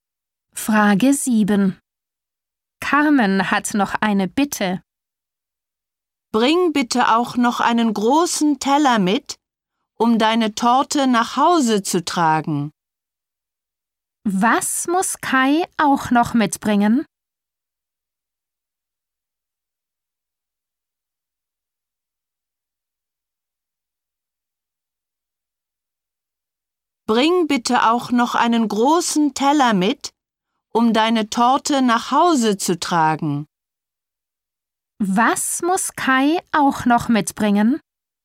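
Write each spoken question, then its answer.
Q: Was muss Kai auch noch mitbringen?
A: einen großen Teller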